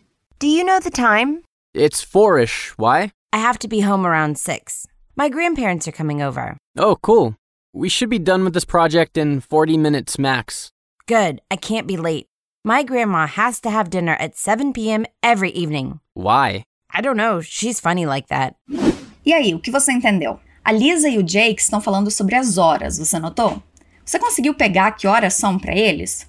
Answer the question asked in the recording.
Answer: São umas quatro horas.